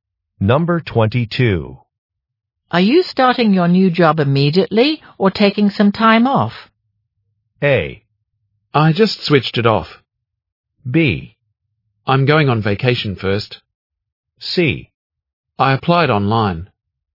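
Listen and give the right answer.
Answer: B: I'm going on vacation first.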